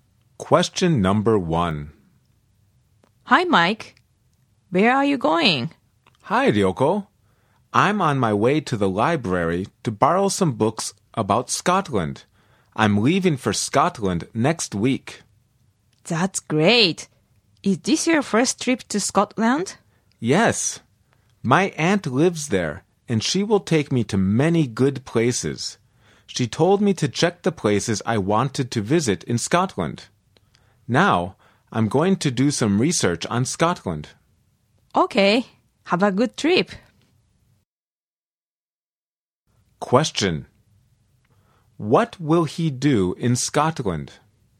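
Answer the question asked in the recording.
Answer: Visit many good places with his aunt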